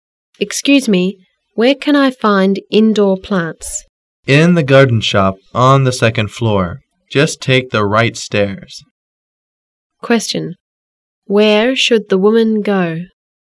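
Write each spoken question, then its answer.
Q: Where should the woman go?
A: To the garden shop on the second floor.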